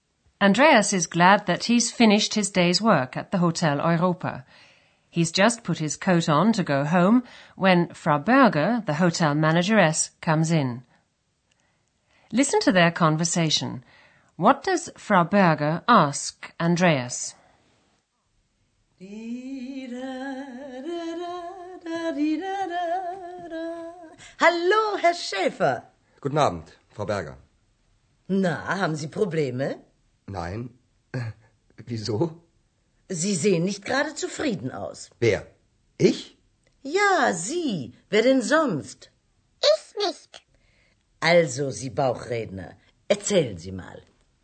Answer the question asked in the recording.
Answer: She asks him if he has problems.